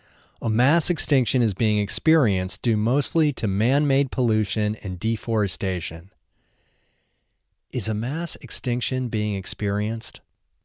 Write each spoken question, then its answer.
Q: Is a mass extinction being experienced?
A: Yes, a mass extinction is being experienced.